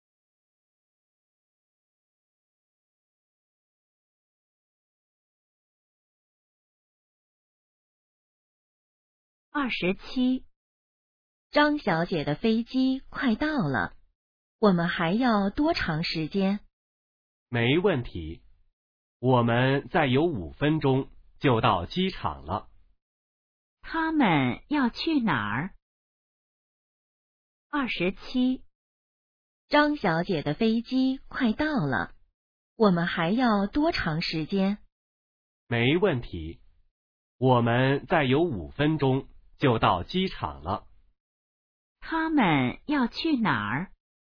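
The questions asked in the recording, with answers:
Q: 他们要去哪儿?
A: 机场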